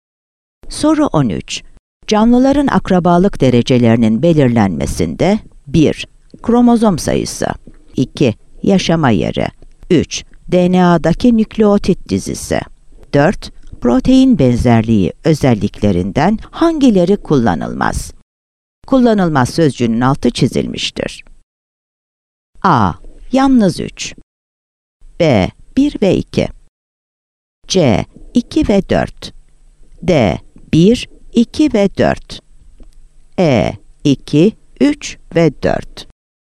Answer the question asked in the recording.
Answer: Yanıt B'dir. 1 ve 2.